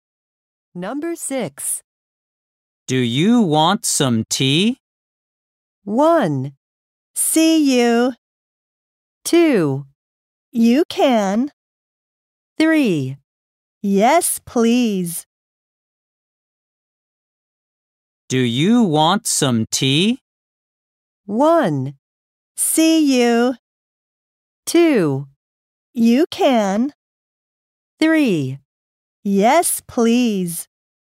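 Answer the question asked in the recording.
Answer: 3: Yes, please.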